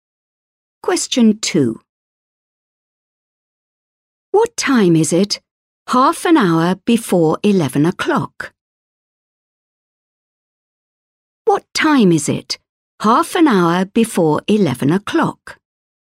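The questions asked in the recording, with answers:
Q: What time is it half an hour before 11 o'clock?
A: 10:30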